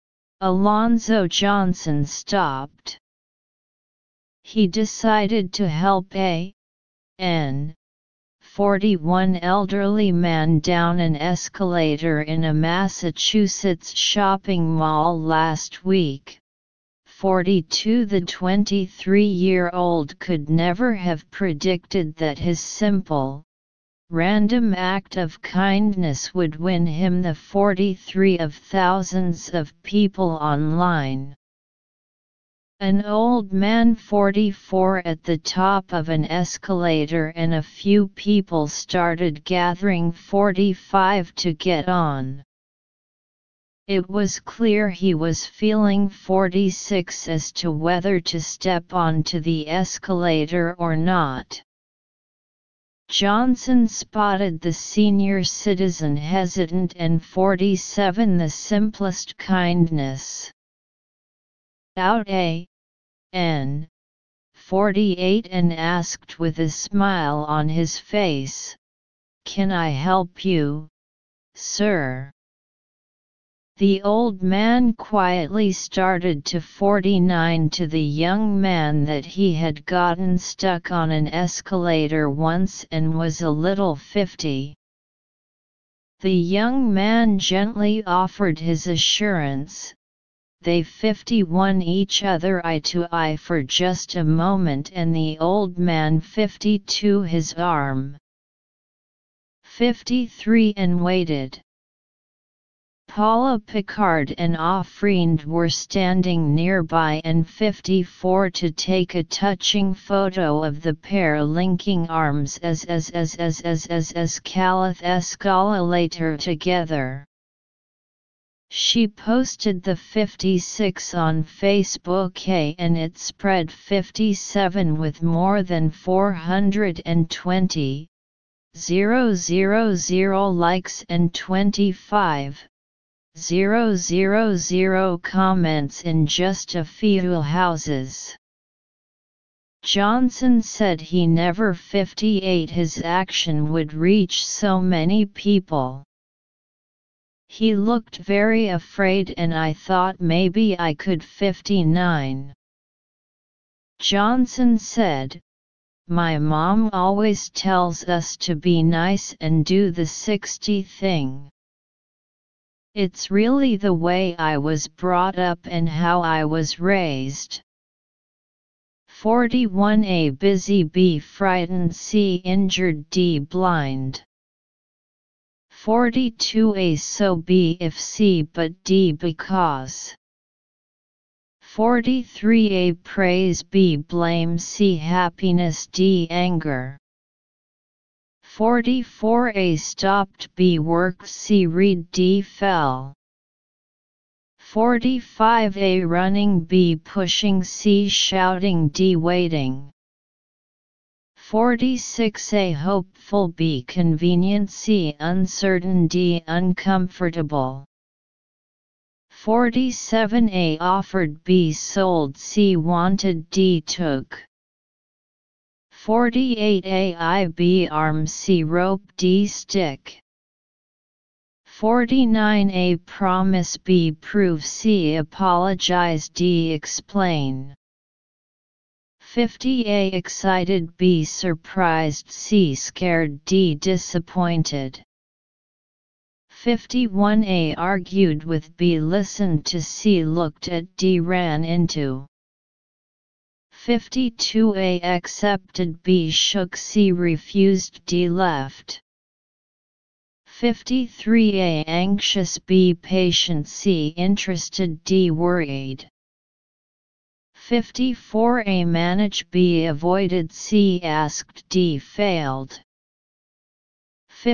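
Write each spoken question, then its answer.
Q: 41 A busy, B frightened, C injured, D blind.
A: B: frightened

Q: 43 A praise, B blame, C happiness, D anger.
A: A: praise

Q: 44 A stopped, B worked, C read, D fell.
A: A: stopped

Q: 45 A running, B pushing, C shouting, D waiting.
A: D: waiting

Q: 46 A hopeful, B convenient, C uncertain, D uncomfortable.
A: C: uncertain

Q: 47 A offered, B sold, C wanted, D took.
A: A: offered

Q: 48 A I B arm, C rope, D stick.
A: B: arm

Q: 49 A promise, B prove, C apologize, D explain.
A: D: explain

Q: 50 A excited, B surprised, C scared, D disappointed.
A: C: scared

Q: 51 A argued with, B listened to, C looked at, D ran into.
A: C: looked at

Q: 52 A accepted, B shook, C refused, D left.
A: A: accepted

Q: 53 A anxious, B patient, C interested, D worried.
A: B: patient

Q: 54 A manage, B avoided, C asked, D failed.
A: A: manage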